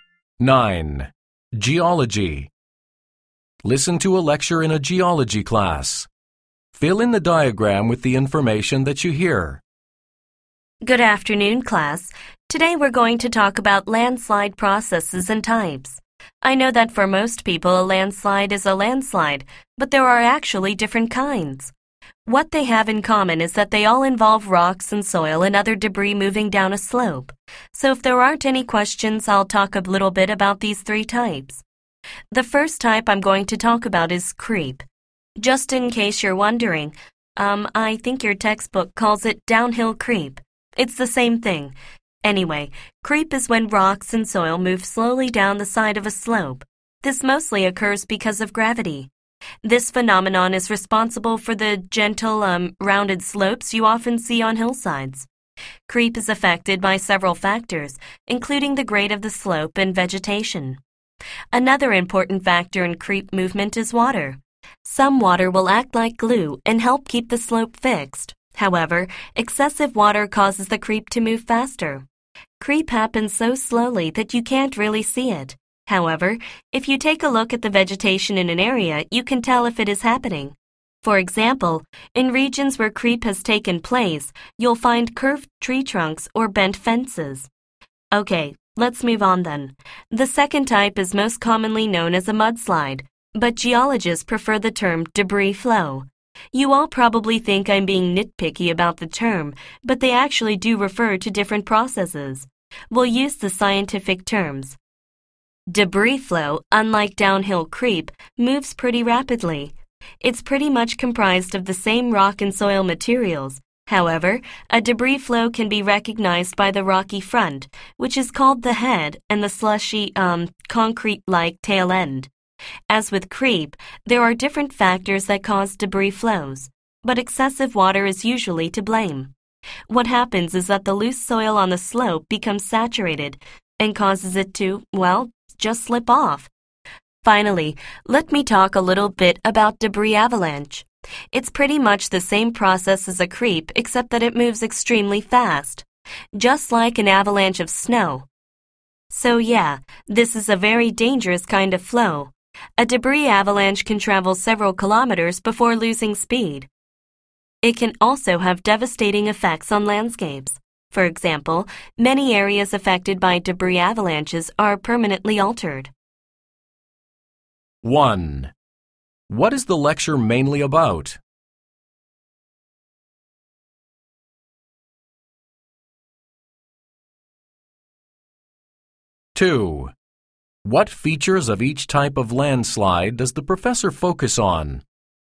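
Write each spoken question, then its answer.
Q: What is the lecture mainly about?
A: The different processes and types of landslides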